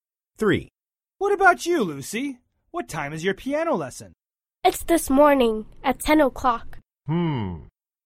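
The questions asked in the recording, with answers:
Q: What about you, Lucy? What time is your piano lesson?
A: 10 o'clock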